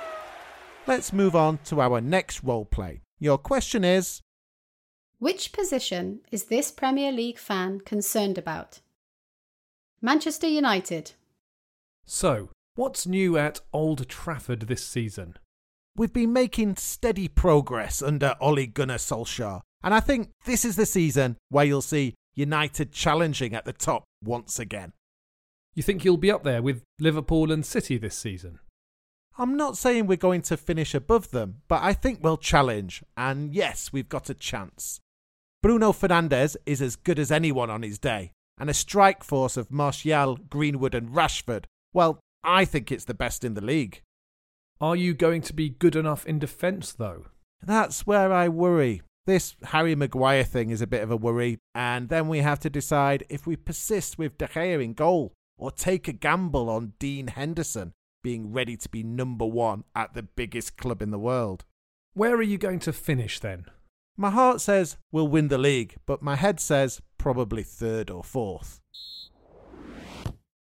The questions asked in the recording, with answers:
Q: which position is this Premier League fan concerned about?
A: The answer is goalkeeper and defence.